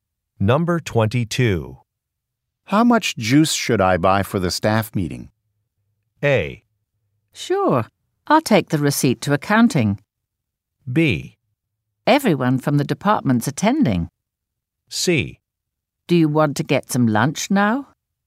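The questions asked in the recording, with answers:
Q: How much juice should I buy for the staff meeting?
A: B: Everyone from the department's attending.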